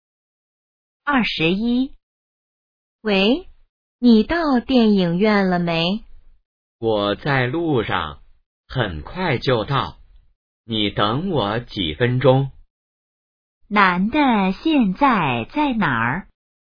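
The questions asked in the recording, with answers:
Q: 男的现在在哪儿?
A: 在路上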